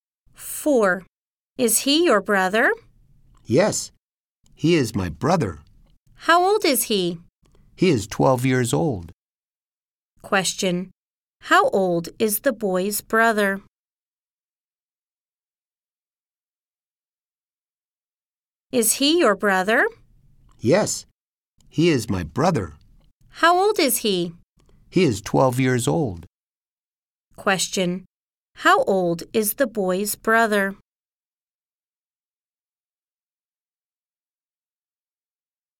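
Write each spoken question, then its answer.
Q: How old is the boy's brother?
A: 12 years old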